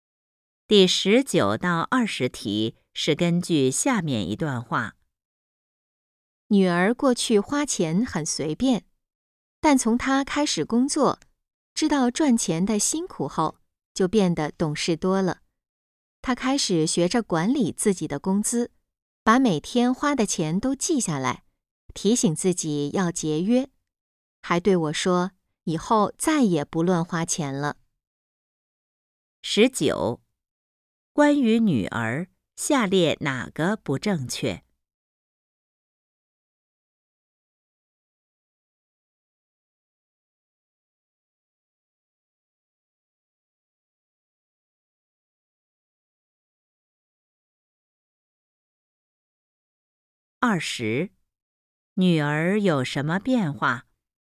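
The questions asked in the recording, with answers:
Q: 二十,女儿有什么变化?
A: 变得懂事了,学会节约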